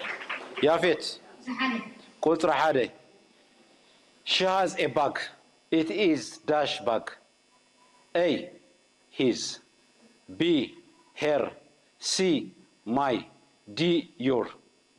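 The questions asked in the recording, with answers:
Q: She has a bag. It is dash bag.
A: B: her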